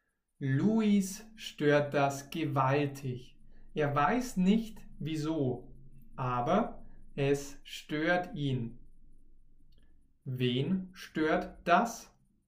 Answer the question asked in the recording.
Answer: Luis. Das stört Luis.